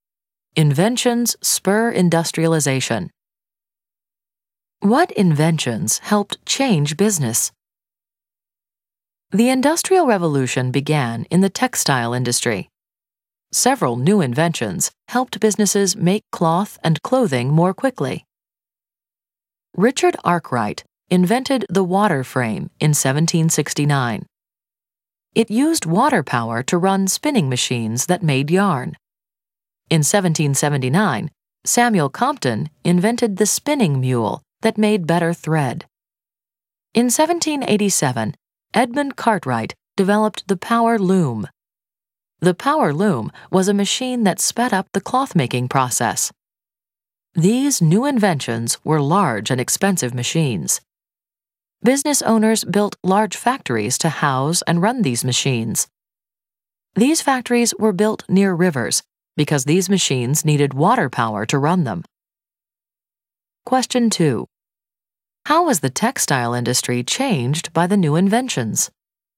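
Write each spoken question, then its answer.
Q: How was the textile industry changed by the new inventions?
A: Cloth was made more quickly by large machines housed in factories built near rivers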